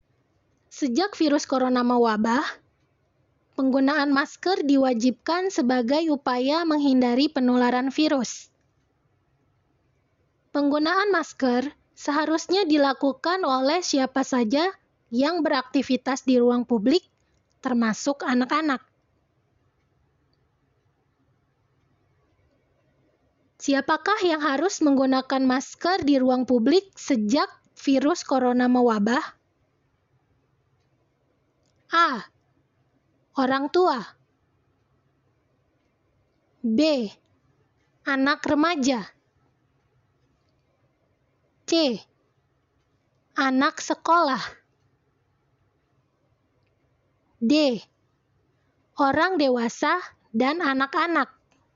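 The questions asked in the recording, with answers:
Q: Siapakah yang harus menggunakan masker di ruang publik sejak virus corona mewabah?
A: D: Orang dewasa dan anak-anak.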